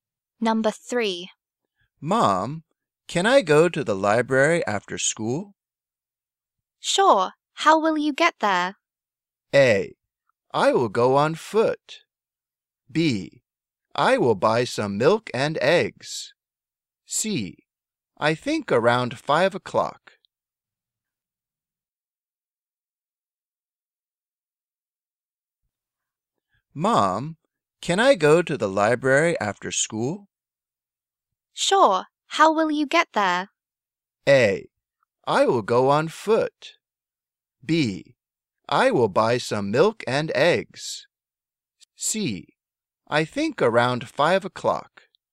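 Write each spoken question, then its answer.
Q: Sure. How will you get there?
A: A: I will go on foot.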